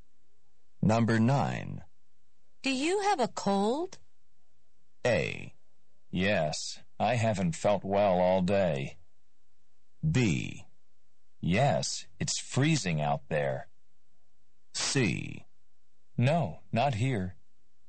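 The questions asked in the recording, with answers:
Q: Do you have a cold?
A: A: Yes, I haven't felt well all day.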